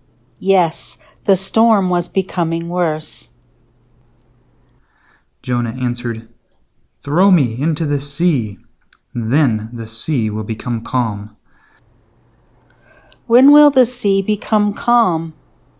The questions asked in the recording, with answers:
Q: When will the sea become calm?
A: The sea will become calm when the sailors throw Jonah into the sea.